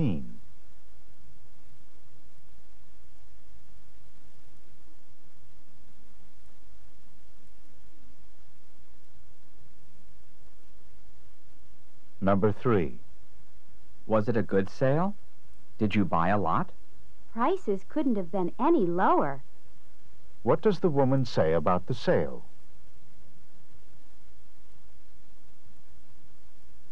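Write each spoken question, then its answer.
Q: What does the woman say about the sale?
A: The prices were extremely low.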